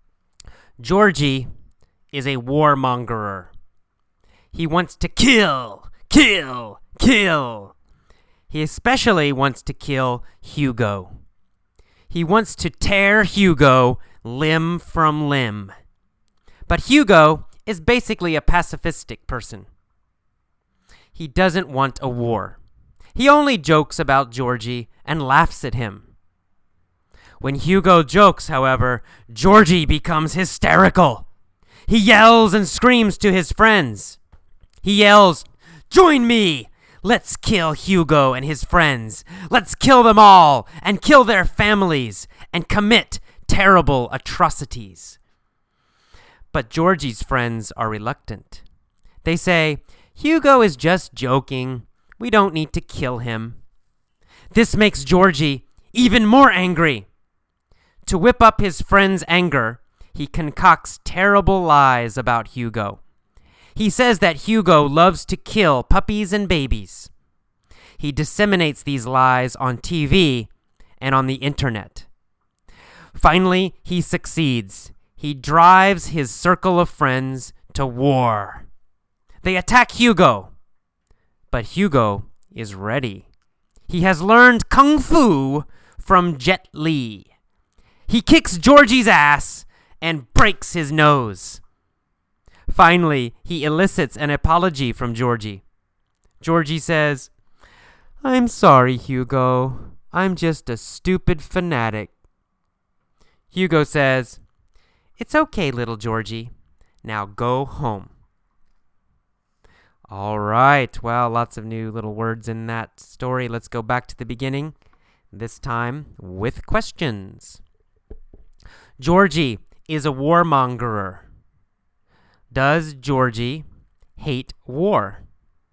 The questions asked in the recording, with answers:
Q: Does Georgie hate war?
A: No, the opposite. Georgie loves war.